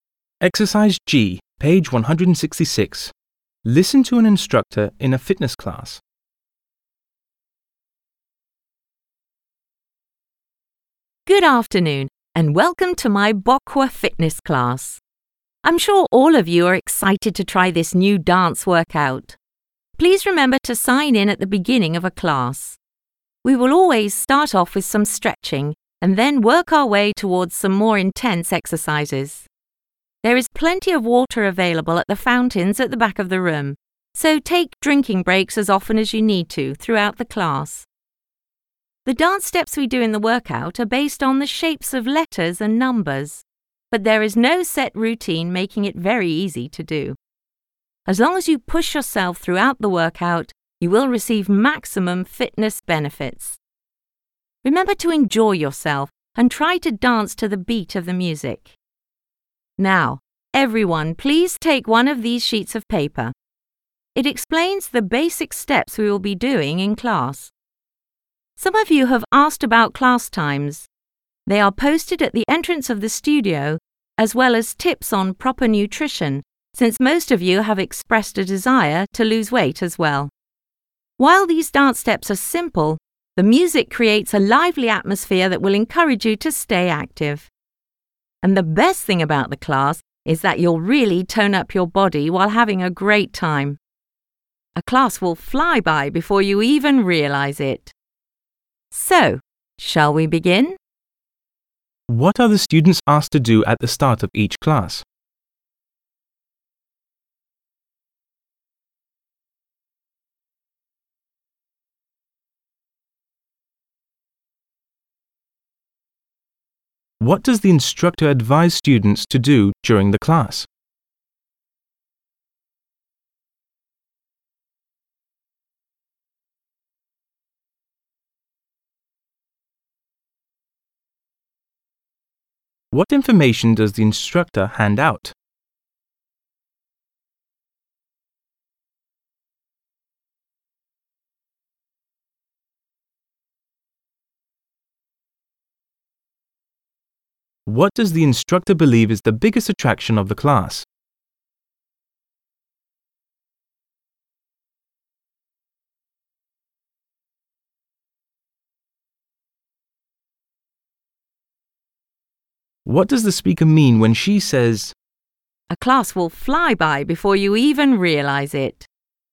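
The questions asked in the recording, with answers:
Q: What are the students asked to do at the start of each class?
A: Sign in

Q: What information does the instructor hand out?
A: The basic steps done in class

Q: What does the instructor believe is the biggest attraction of the class?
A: Toning up your body while having a great time

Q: What does the speaker mean when she says,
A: The class will seem to pass very quickly because it is fun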